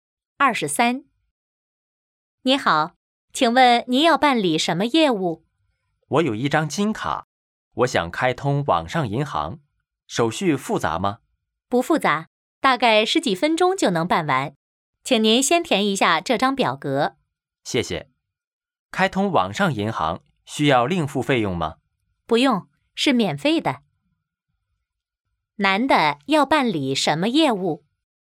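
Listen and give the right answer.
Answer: 开通网上银行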